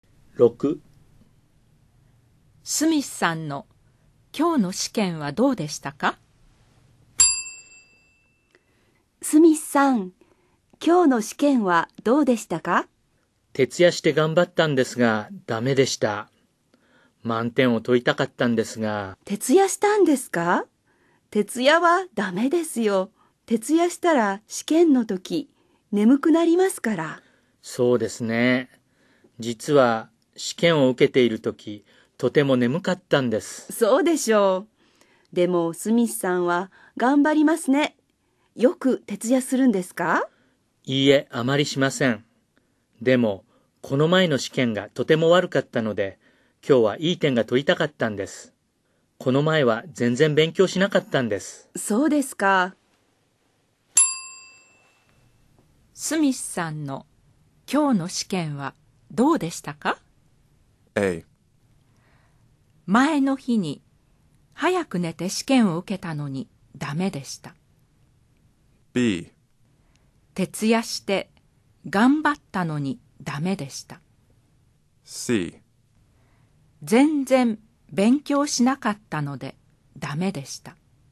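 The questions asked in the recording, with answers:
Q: スミスさんの今日の試験はどうでしたか?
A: B: 徹夜して頑張ったのにダメでした。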